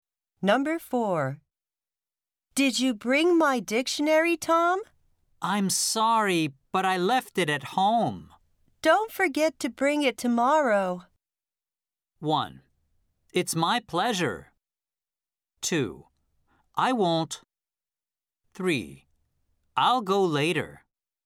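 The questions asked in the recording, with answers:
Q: Don't forget to bring it tomorrow.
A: 2: I won't.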